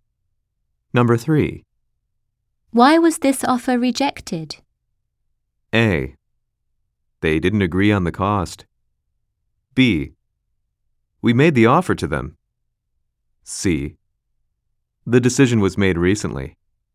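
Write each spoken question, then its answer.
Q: Why was this offer rejected?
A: C: They didn't agree on the cost.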